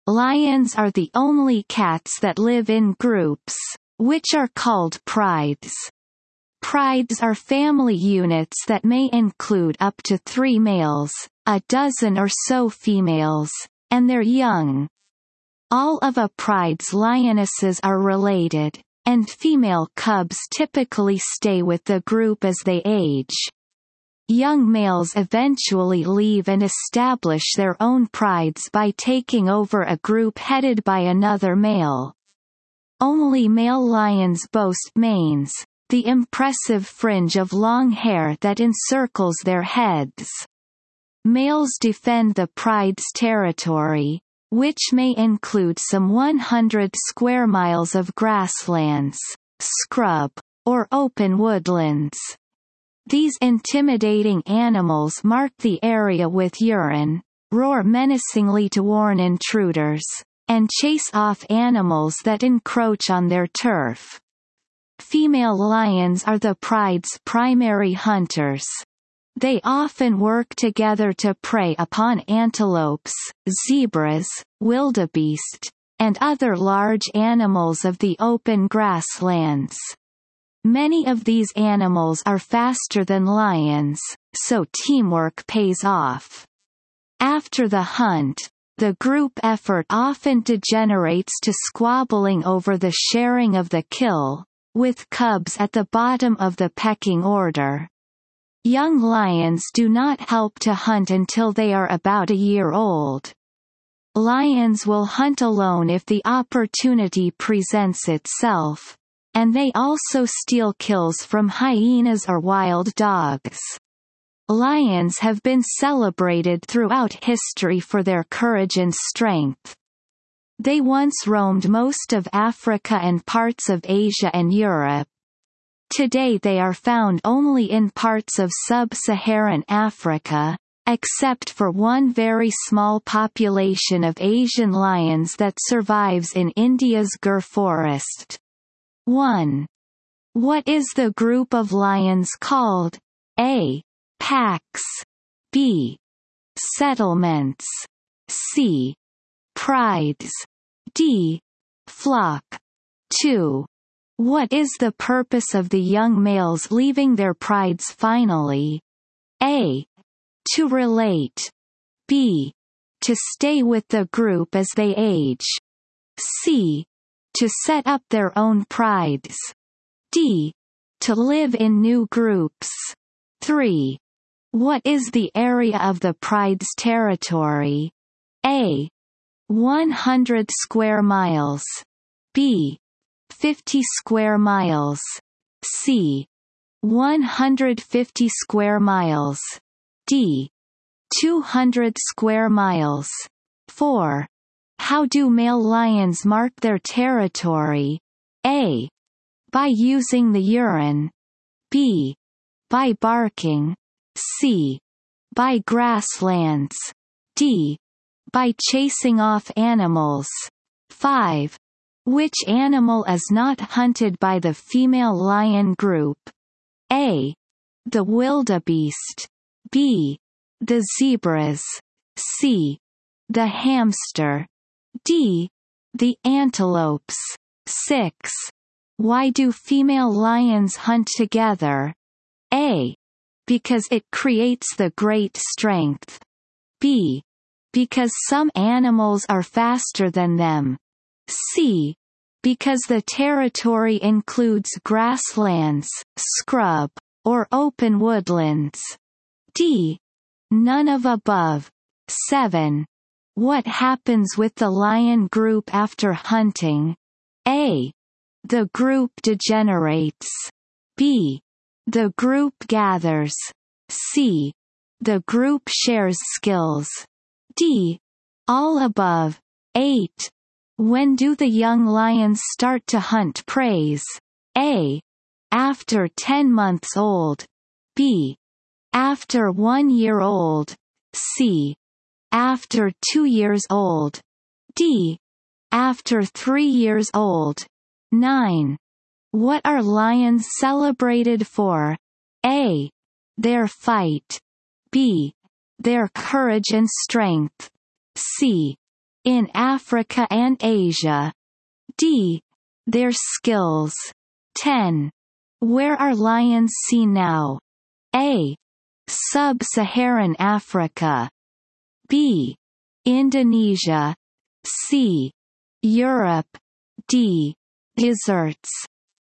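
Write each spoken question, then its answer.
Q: What is the group of lions called?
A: C: Prides.

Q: What is the purpose of the young males leaving their prides finally?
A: C: To set up their own prides.

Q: What is the area of the pride's territory?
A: A: 100 square miles.

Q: How do male lions mark their territory?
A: A: By using the urine.

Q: Which animal is not hunted by the female lion group?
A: C: The hamster.

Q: Why do female lions hunt together?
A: B: Because some animals are faster than them.

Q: When do the young lions start to hunt prey?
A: B: After 1 year old.

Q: What are lions celebrated for?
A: B: Their courage and strength.

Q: Where are lions seen now?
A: A: Sub-Saharan Africa.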